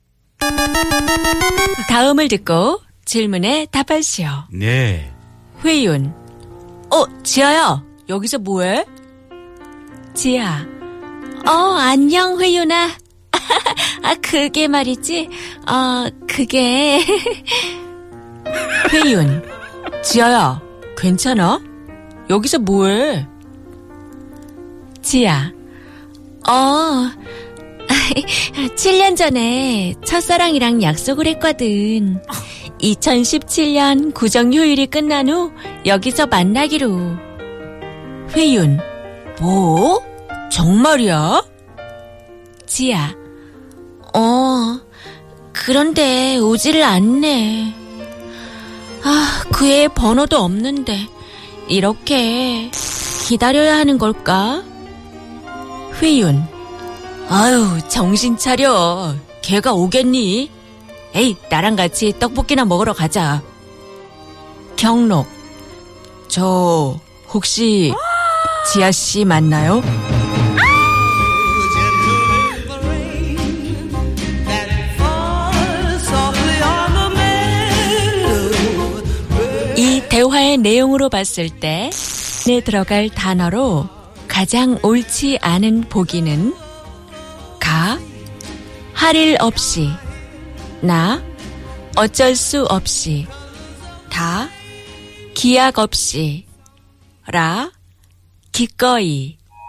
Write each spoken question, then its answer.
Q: 대화의 내용으로 봤을 때 내 들어갈 단어로 가장 옳지 않은 보기는 가, 할 일 없이, 나, 어쩔 수 없이, 다, 기약 없이, 라, 기꺼이.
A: La kikoi.